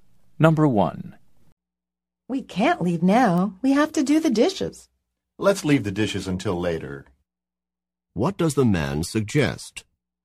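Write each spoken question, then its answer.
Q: What does the man suggest?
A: Doing the dishes later.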